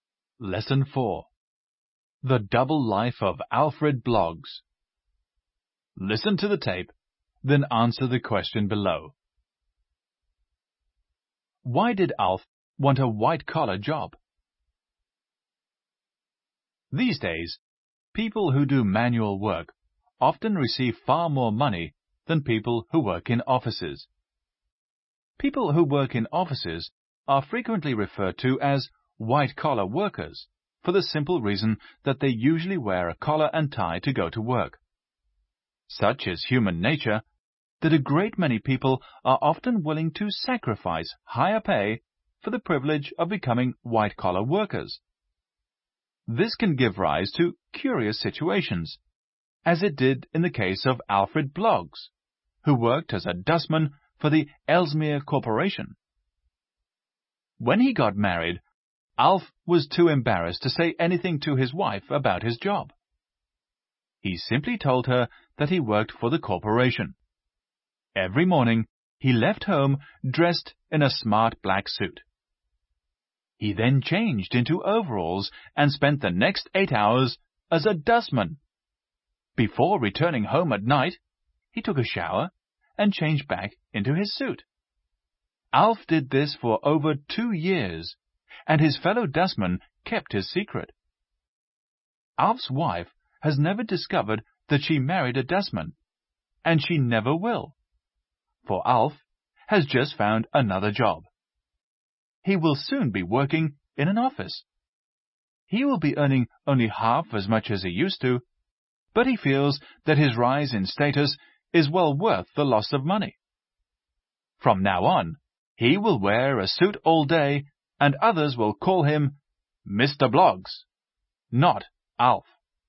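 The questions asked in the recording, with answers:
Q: Why did Alf want a white-collar job?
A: He felt the rise in status was worth the loss of money (he was embarrassed to be a dustman).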